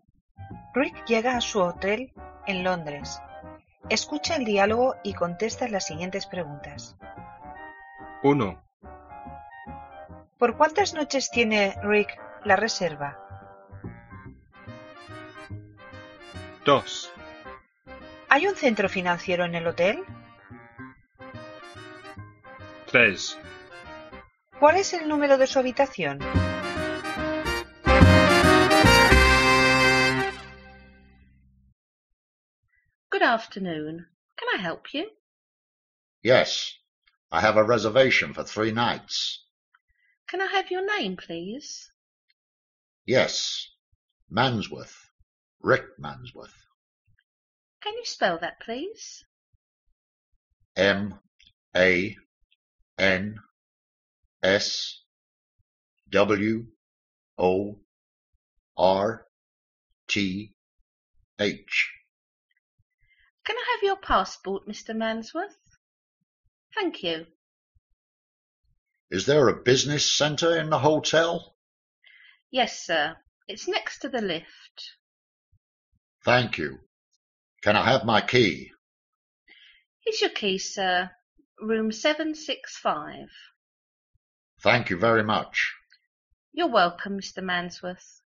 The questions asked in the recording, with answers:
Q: ¿Por cuántas noches tiene Rick la reserva?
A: For 3 nights.

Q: ¿Hay un centro financiero en el hotel?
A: Yes, there is.

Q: ¿Cuál es el número de su habitación?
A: 765.